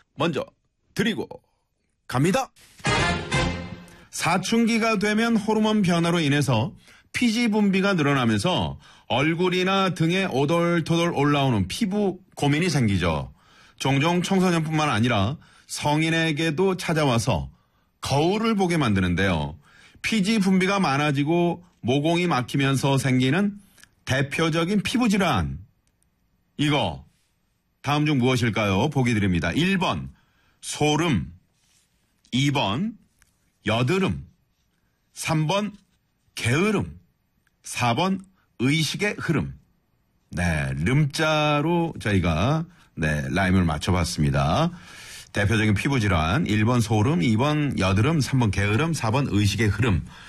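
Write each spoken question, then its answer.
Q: 이거 다음 중 무엇일까요?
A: 2: 여드름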